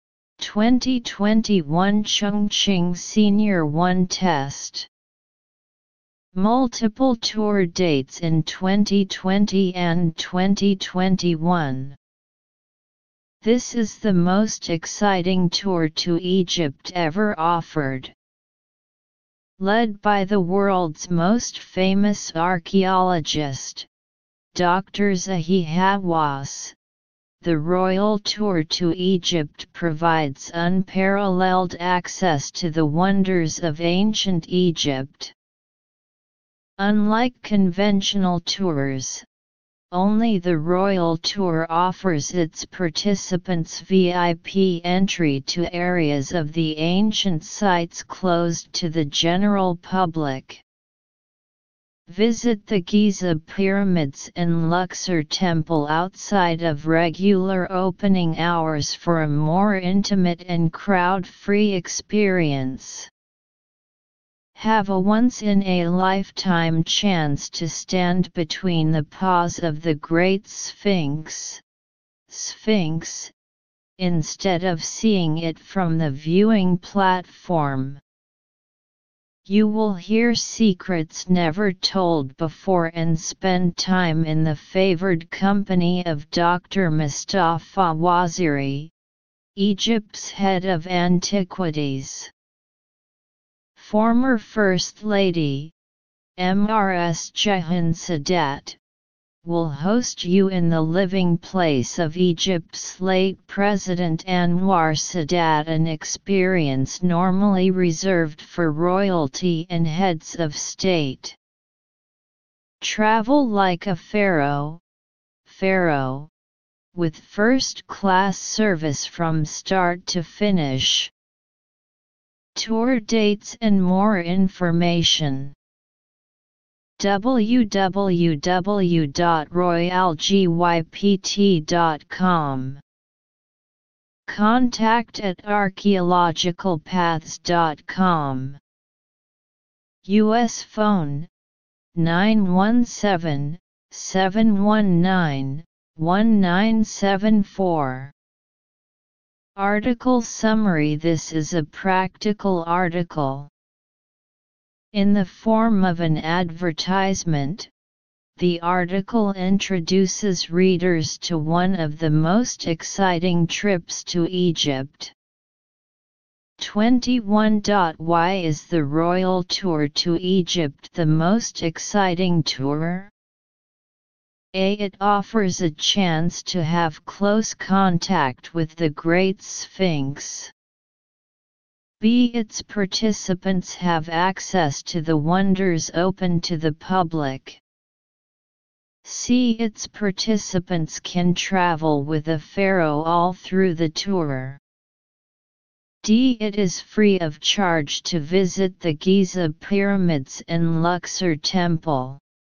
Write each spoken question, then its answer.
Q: Why is the royal tour to Egypt the most exciting tour?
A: Analysis. Choose A.